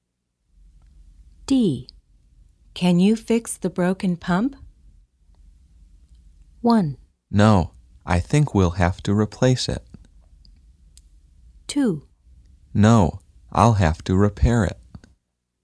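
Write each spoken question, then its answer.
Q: Can you fix the broken pump?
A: 1: No, I think we'll have to replace it.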